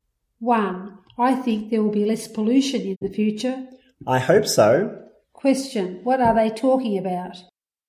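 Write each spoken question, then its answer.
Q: What are they talking about?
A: Pollution in the future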